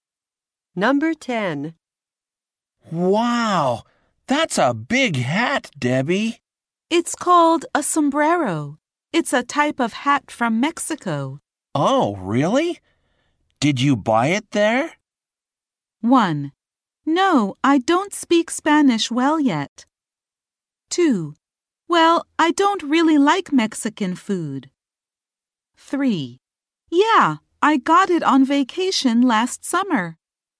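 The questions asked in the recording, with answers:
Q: Oh, really? Did you buy it there?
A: 3: Yeah, I got it on vacation last summer.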